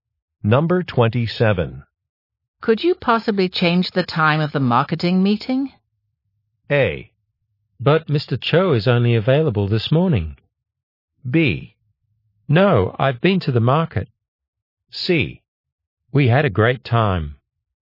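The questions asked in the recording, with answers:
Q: Could you possibly change the time of the marketing meeting?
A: A: But Mr. Cho is only available this morning.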